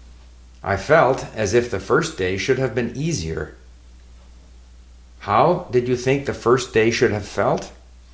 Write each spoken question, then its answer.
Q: How did you think the first day should have felt?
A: I thought the first day should have felt easier.